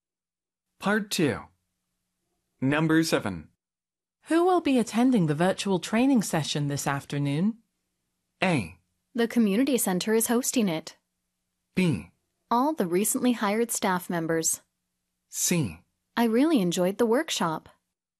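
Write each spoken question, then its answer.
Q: Who will be attending the virtual training session this afternoon?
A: B: All the recently hired staff members.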